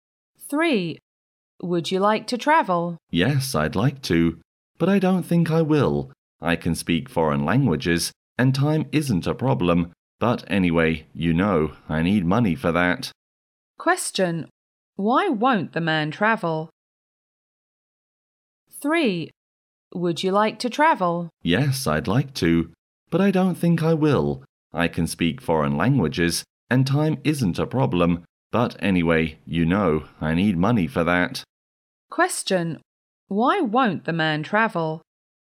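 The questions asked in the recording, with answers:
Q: Why won't the man travel?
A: He doesn't have enough money.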